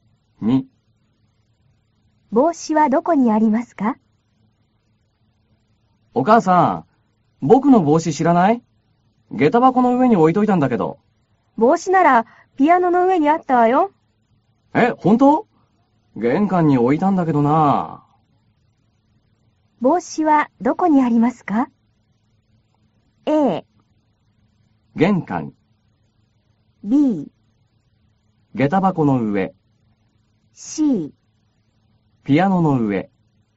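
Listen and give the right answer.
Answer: C: ピアノの上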